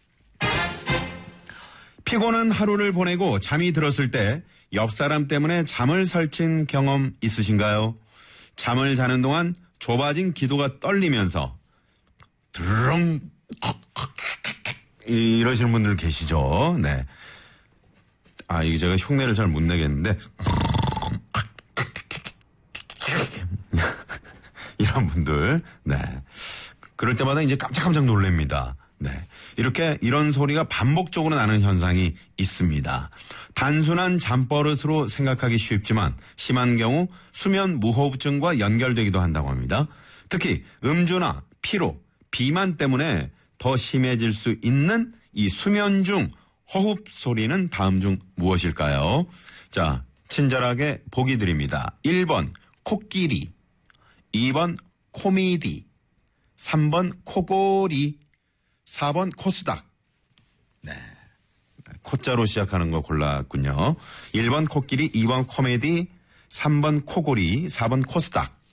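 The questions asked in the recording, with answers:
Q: 특히 음주나 피로, 비만 때문에 더 심해질 수 있는 이 수면 중 호흡 소리는 다음 중 무엇일까요?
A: 3: 코골이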